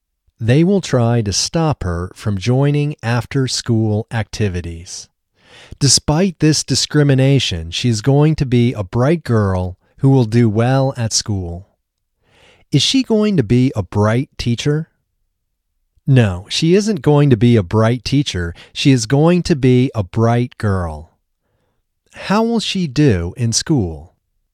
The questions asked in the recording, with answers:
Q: How will she do in school?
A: She will do well in school.